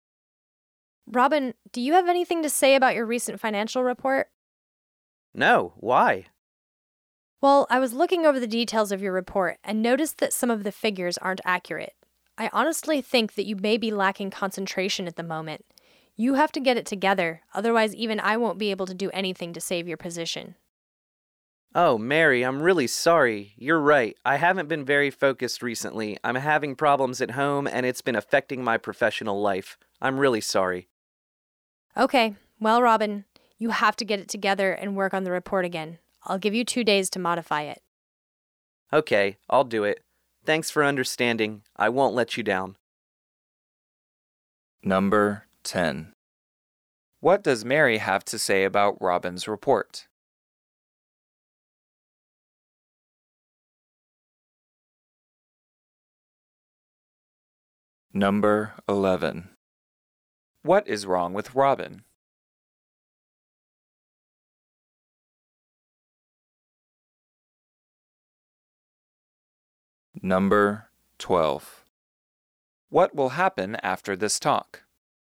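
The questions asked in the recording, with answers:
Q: What does Mary have to say about Robin's report?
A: Some of the figures aren't accurate

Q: What is wrong with Robin?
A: He has problems at home and can't concentrate

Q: What will happen after this talk?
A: Robin will redo the report within 2 days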